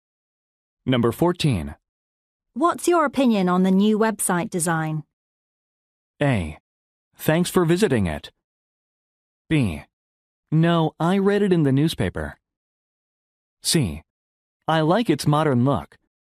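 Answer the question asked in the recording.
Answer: C: I like its modern look.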